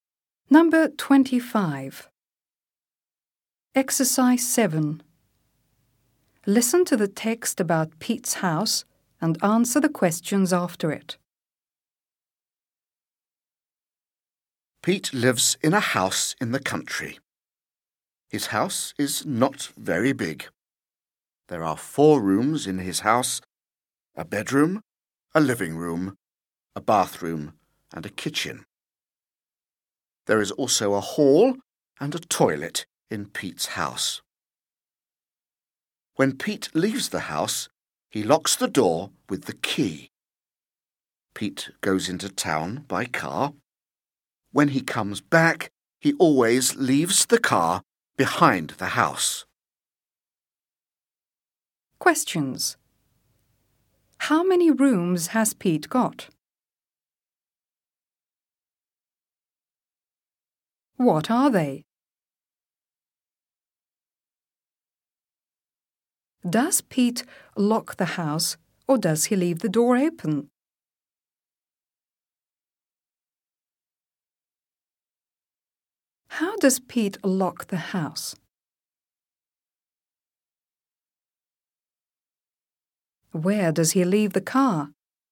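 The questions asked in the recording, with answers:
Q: How many rooms has Pete got?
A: Four

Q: What are they?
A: A bedroom, a living room, a bathroom and a kitchen

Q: Does Pete lock the house or does he leave the door open?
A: He locks the house

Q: How does Pete lock the house?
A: With the key

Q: Where does he leave the car?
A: Behind the house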